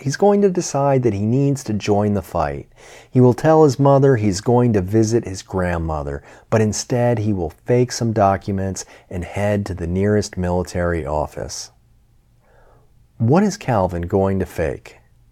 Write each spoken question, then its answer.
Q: What is Calvin going to fake?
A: Calvin is going to fake some documents.